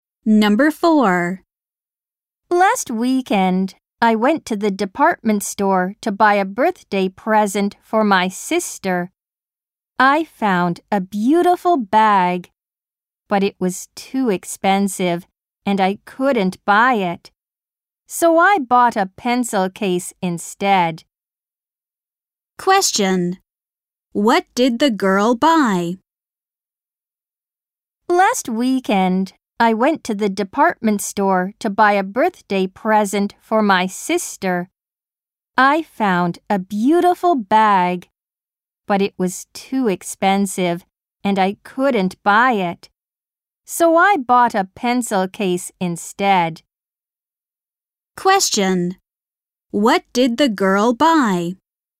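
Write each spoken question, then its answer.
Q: What did the girl buy?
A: A pencil case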